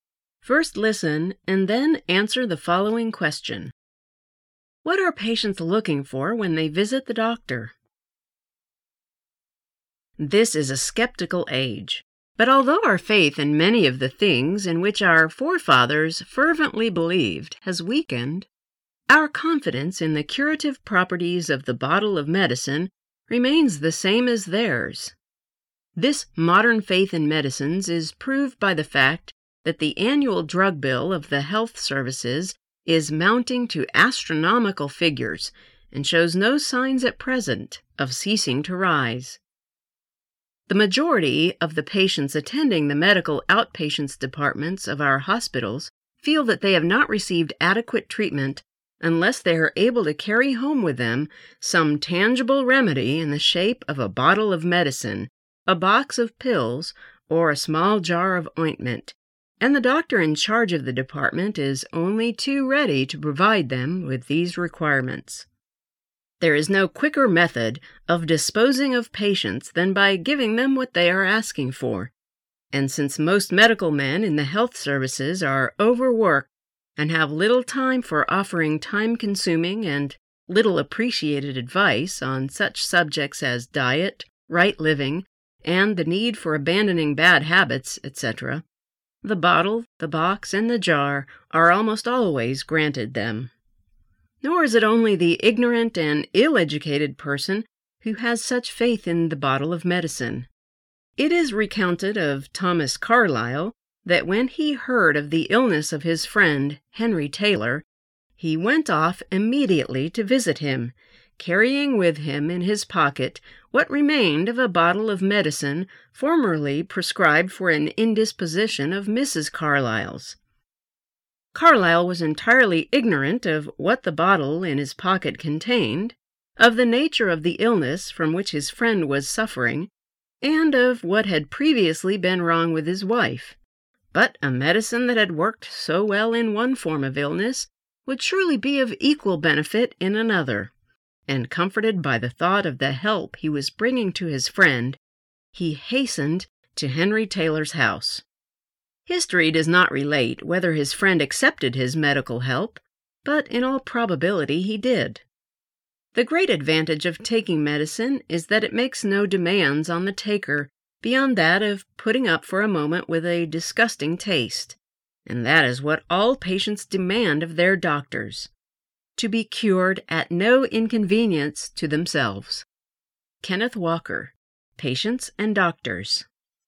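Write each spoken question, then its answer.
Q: What are patients looking for when they visit the doctor?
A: A tangible remedy such as medicine, pills or ointment — to be cured at no inconvenience to themselves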